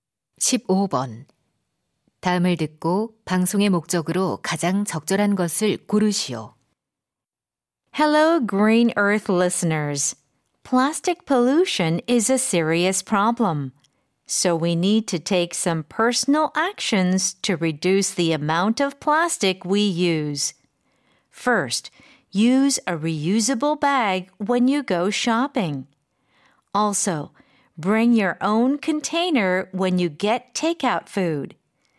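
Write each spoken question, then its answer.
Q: 다음을 듣고 방송의 목적으로 가장 적절한 것을 고르시오.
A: 플라스틱 사용 줄이기 실천을 독려하려고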